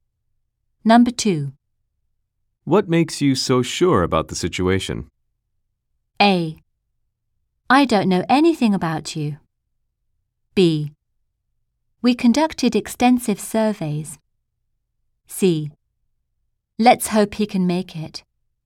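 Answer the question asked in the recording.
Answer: B: We conducted extensive surveys.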